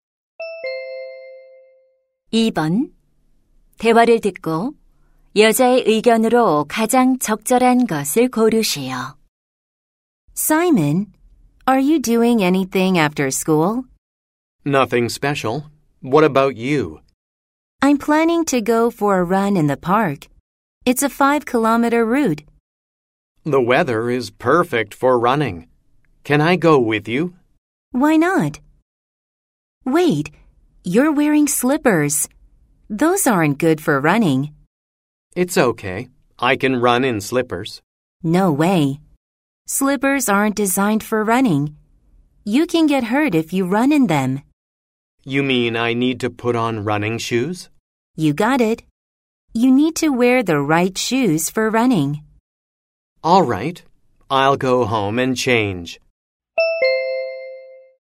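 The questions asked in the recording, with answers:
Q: 대화를 듣고 여자의 의견으로 가장 적절한 것을 고르시오.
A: 달릴 때는 알맞은 운동화를 신어야 한다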